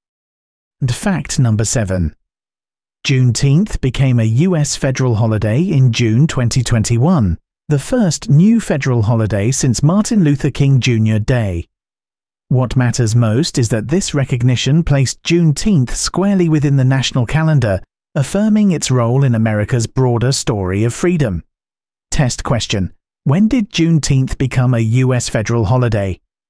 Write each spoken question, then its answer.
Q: When did Juneteenth become a US federal holiday?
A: June 2021.